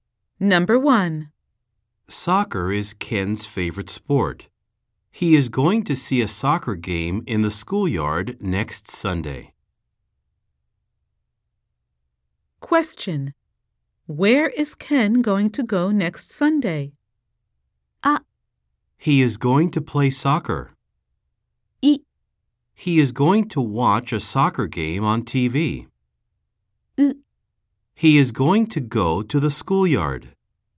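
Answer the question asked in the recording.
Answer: ウ: He is going to go to the schoolyard.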